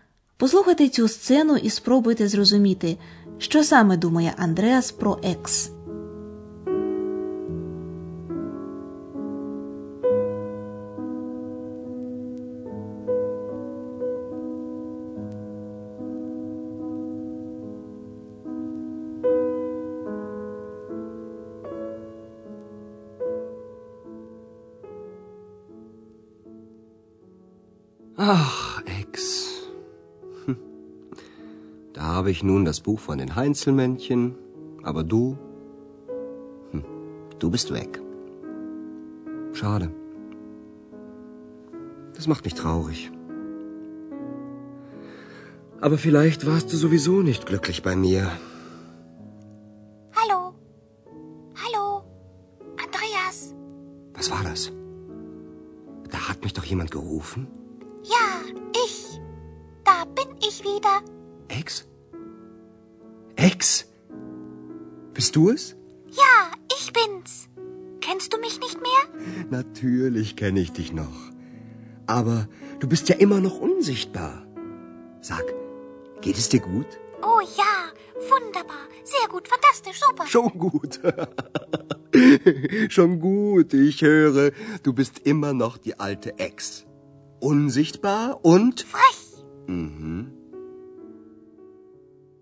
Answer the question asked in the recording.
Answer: Андреасові здається, що Екс все одно не була з ним щасливою.